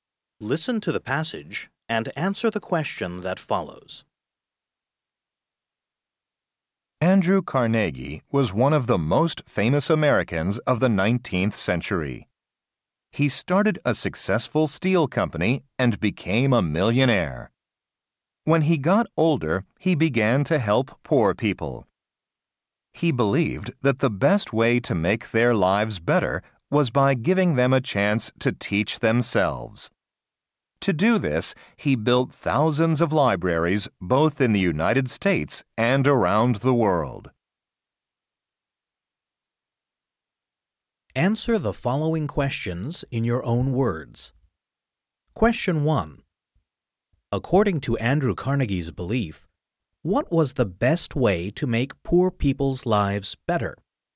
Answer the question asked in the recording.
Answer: Carnegie believed that the best way to make poor people's lives better was by giving them a chance to teach themselves.